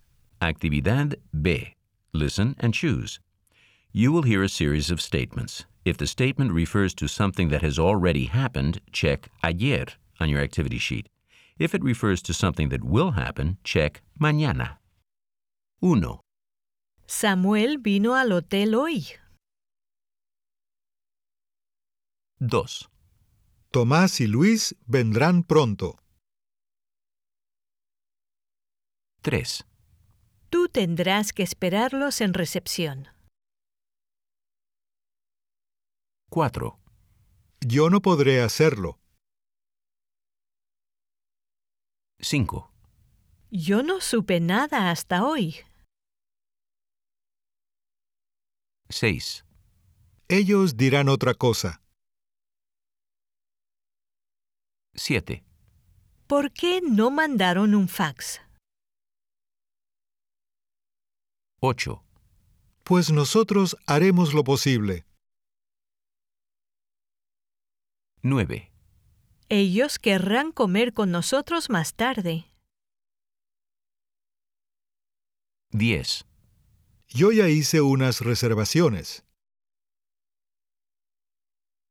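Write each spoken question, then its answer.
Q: Samuel vino al hotel hoy.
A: ayer

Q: Tomás y Luis vendrán pronto.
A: mañana

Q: Tú tendrás que esperarlos en recepción.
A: mañana

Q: Yo no podré hacerlo.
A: mañana

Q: Yo no supe nada hasta hoy.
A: ayer

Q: Ellos dirán otra cosa.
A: mañana

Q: ¿Por qué no mandaron un fax?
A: ayer

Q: Pues nosotros haremos lo posible.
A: mañana

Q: Ellos querrán comer con nosotros más tarde.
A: mañana

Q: Yo ya hice unas reservaciones.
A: ayer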